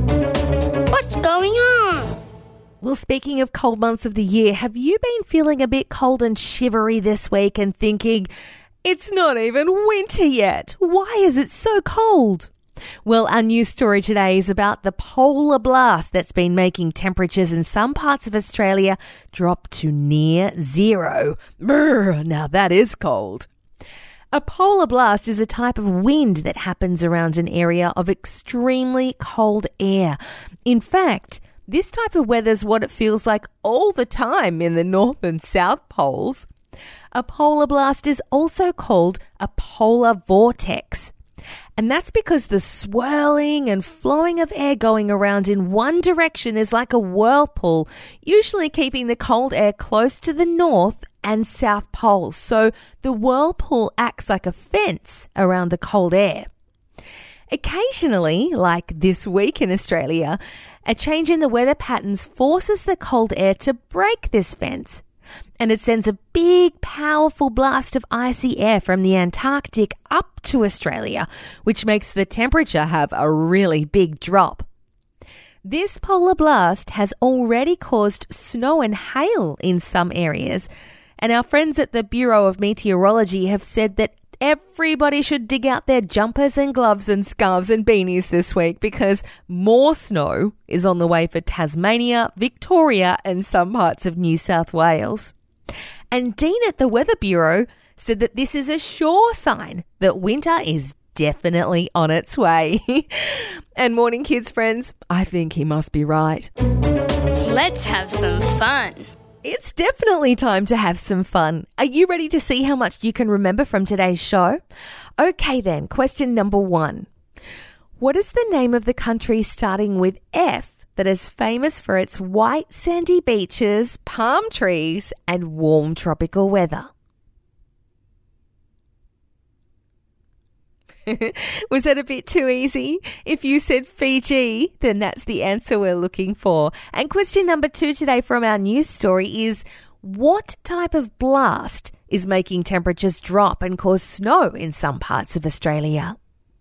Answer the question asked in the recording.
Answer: if you answered polar blast, that's correct.